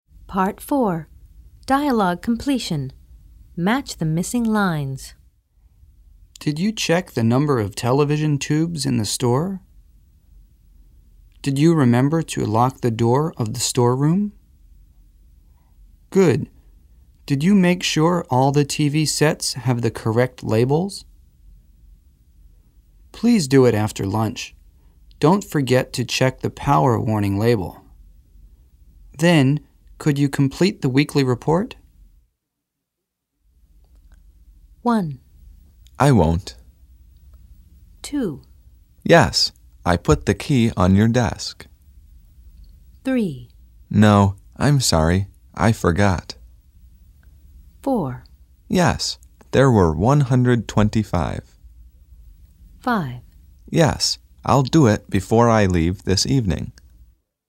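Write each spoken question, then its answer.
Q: I won't.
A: Don't forget to check the power warning label.

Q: Yes, I put the key on your desk.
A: Did you remember to lock the door of the storeroom?

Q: No, I'm sorry, I forgot.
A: Good. Did you make sure all the TV sets have the correct labels?

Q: Yes, there were 125.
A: Did you check the number of television tubes in the store?

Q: Yes, I'll do it before I leave this evening.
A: Then, could you complete the weekly report?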